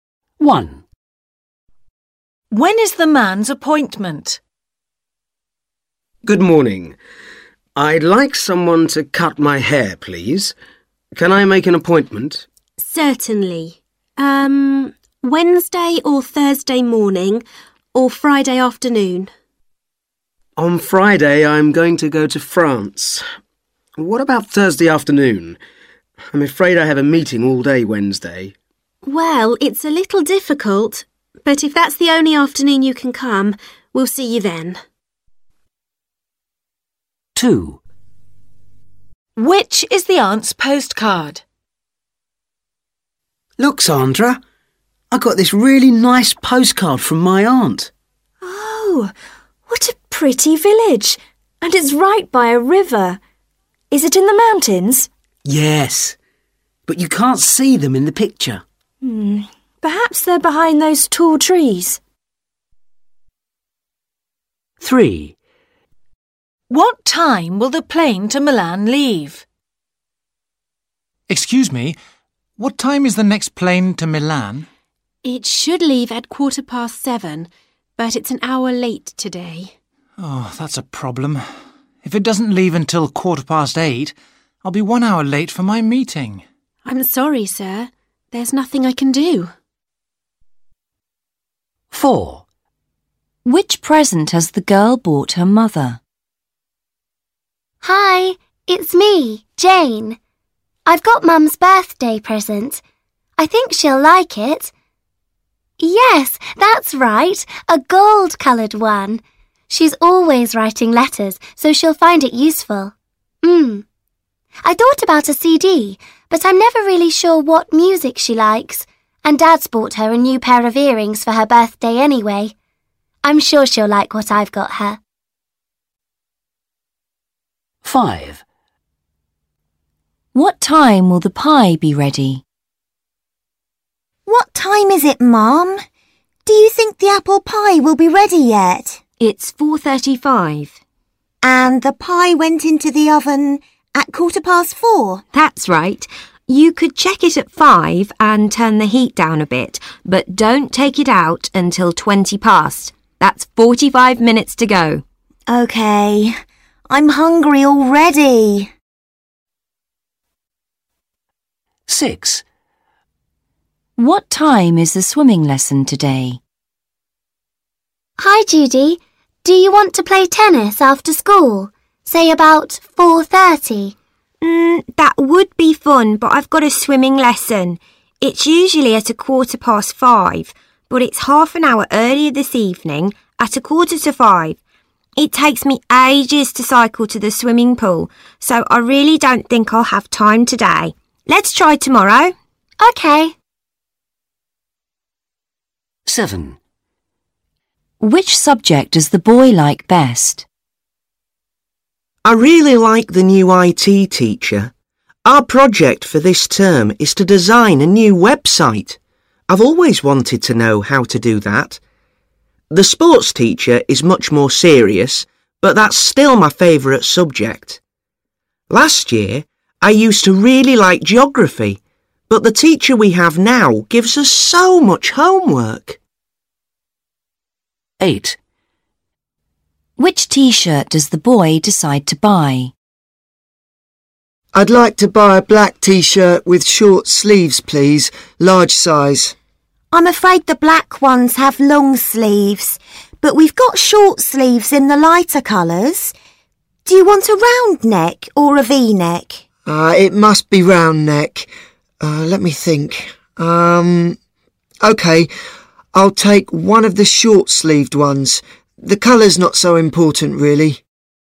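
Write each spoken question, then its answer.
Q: When is the man's appointment?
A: Thursday afternoon

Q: What time will the plane to Milan leave?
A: 8:15

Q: What time will the pie be ready?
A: 5:20

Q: What time is the swimming lesson today?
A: 4:45

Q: Which subject does the boy like best?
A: sport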